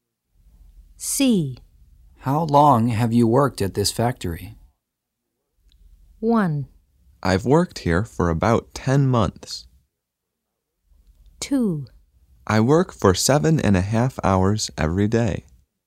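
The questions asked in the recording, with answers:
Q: How long have you worked at this factory?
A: 1: I've worked here for about 10 months.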